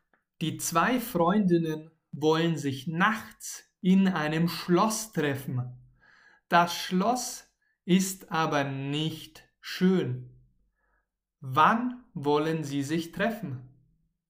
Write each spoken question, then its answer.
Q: Wann wollen sie sich treffen?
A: Nachts. Sie wollen sich nachts treffen.